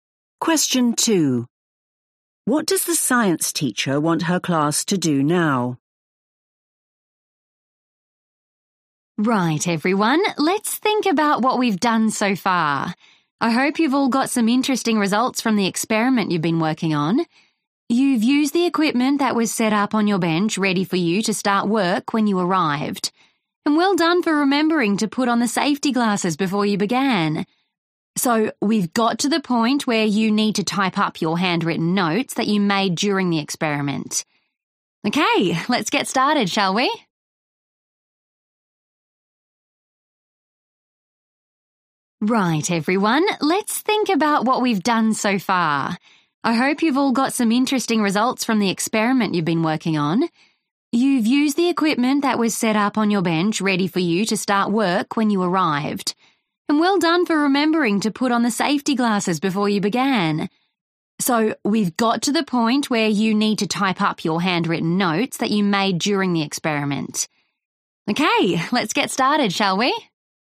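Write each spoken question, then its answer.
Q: What does the science teacher want her class to do now?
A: type up their handwritten notes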